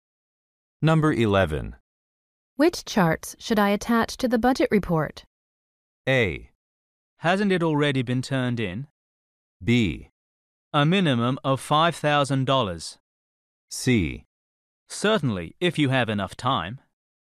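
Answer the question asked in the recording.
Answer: A: Hasn't it already been turned in?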